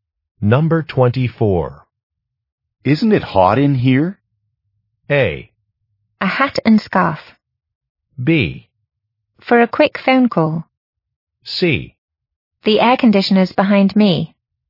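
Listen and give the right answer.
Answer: C: The air conditioner's behind me.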